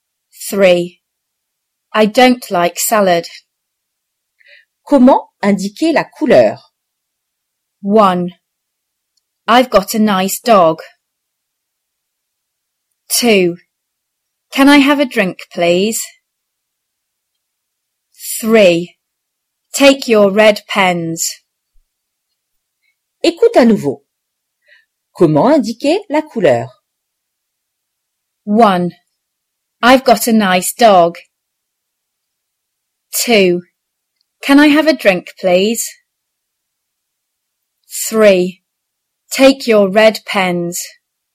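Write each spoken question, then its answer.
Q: Comment indiquer la couleur?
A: 3: Take your red pens.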